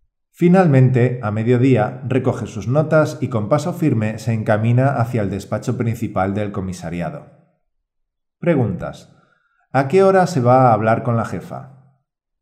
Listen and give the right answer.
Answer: A mediodía. A las 12 del mediodía Pepe va a hablar con su jefa.